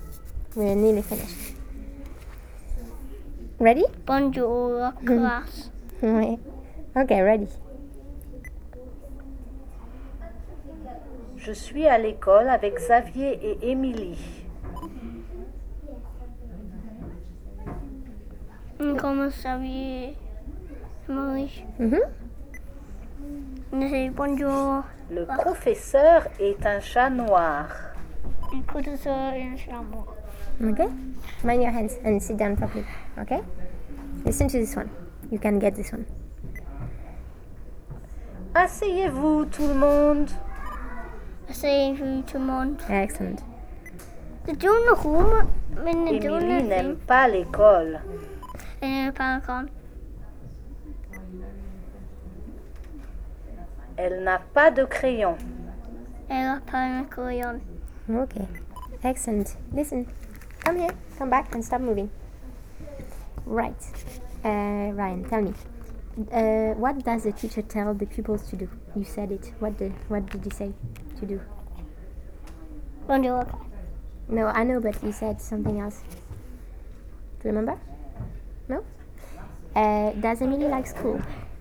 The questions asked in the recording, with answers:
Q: Does Emily like school?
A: No, she doesn't.